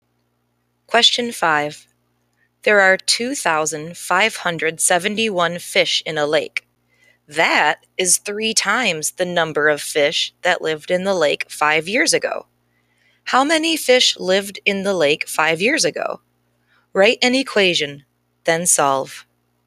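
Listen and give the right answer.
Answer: 857 fish (3x = 2,571, x = 857)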